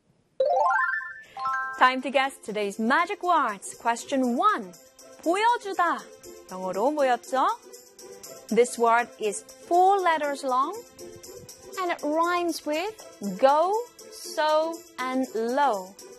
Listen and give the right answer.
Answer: S-H-O-W, show.